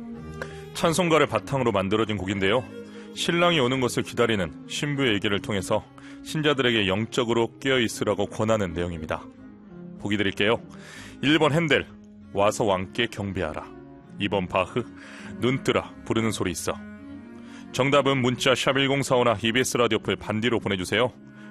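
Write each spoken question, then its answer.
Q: 보기 드릴게요. 1번 핸델, 와서 왕께 경배하라. 2번 바흐, 눈뜨라 부르는 소리 있어.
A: 2: 바흐, 눈뜨라 부르는 소리 있어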